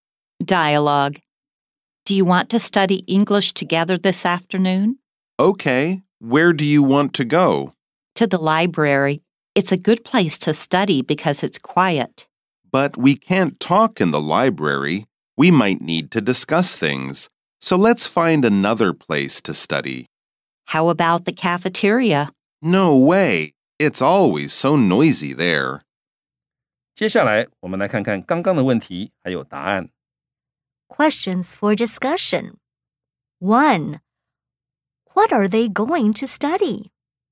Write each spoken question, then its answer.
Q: What are they going to study?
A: Answer. They are going to study English.